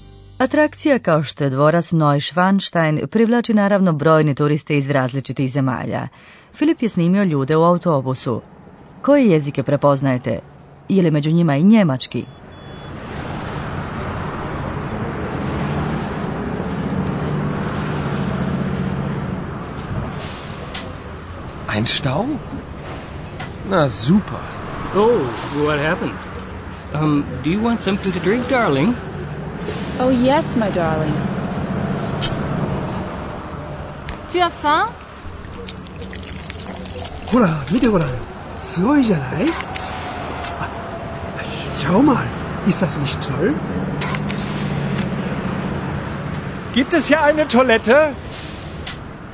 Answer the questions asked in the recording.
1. Možda ste uspjeli razaznati engleski ili francuski, ili japanski?
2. Njemački ste vjerojatno razumjeli.